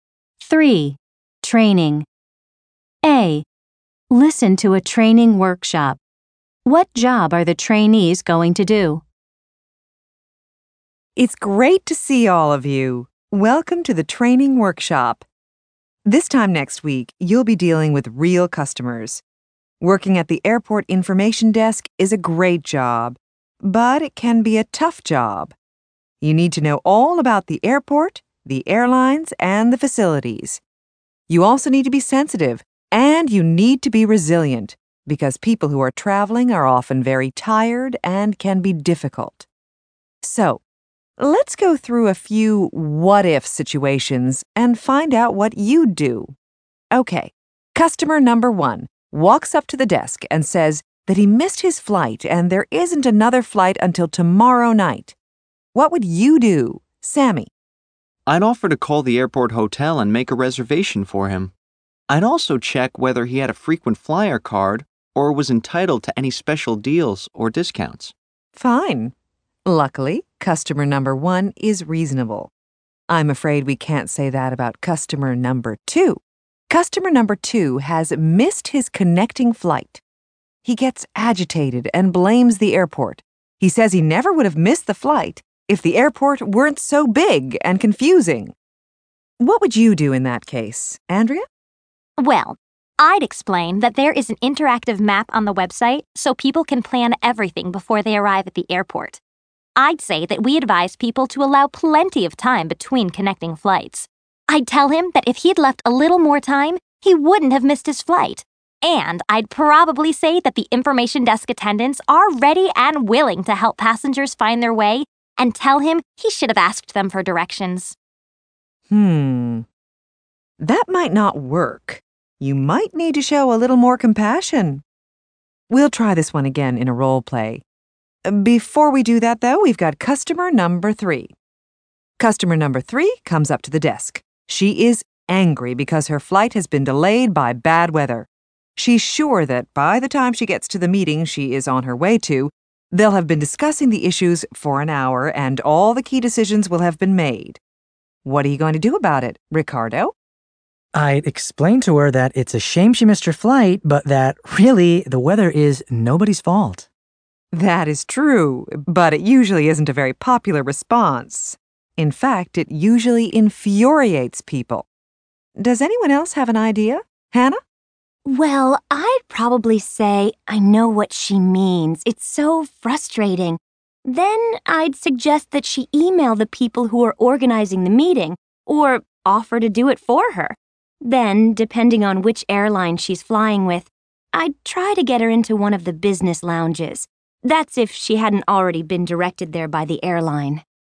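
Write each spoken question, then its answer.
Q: What job are the trainees going to do?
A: Working at the airport information desk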